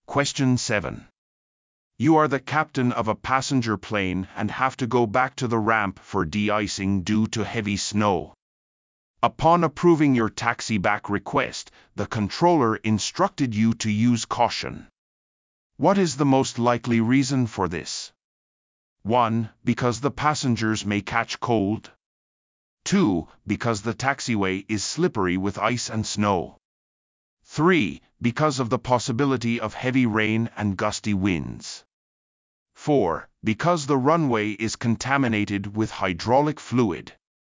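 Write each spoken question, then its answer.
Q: What is the most likely reason for this?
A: 2: Because the taxiway is slippery with ice and snow.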